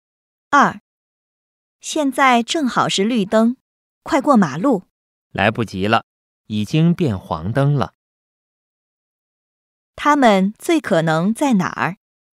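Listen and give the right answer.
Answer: 路口(马路边)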